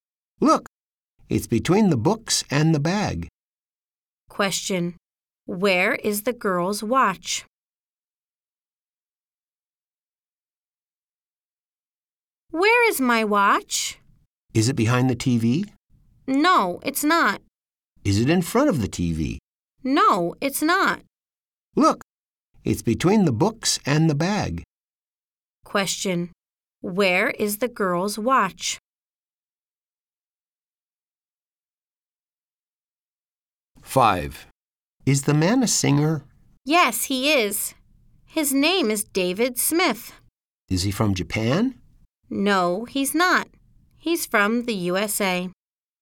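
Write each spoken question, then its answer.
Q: Where is the girl's watch?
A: Between the books and the bag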